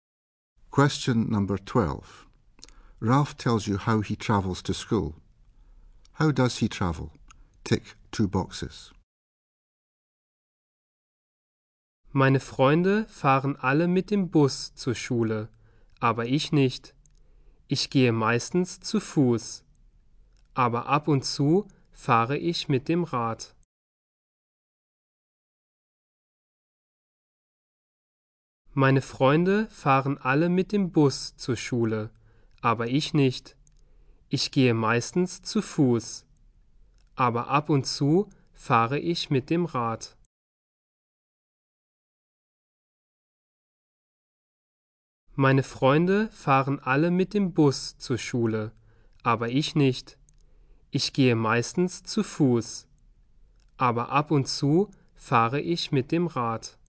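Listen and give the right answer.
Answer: Mostly on foot, sometimes by bike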